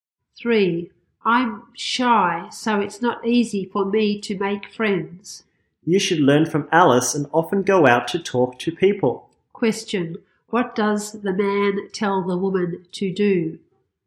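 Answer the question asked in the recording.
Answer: Learn from Alice and often go out to talk to people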